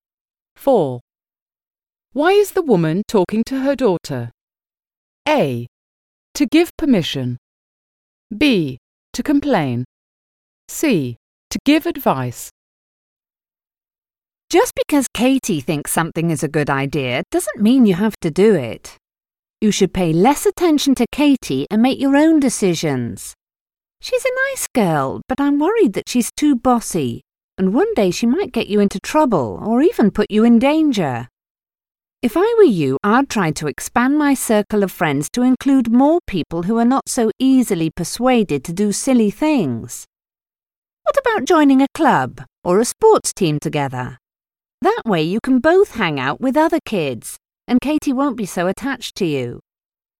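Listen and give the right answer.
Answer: C: To give advice.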